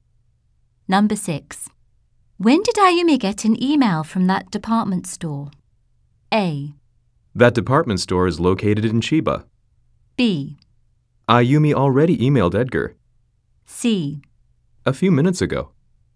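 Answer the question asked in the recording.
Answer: C: A few minutes ago.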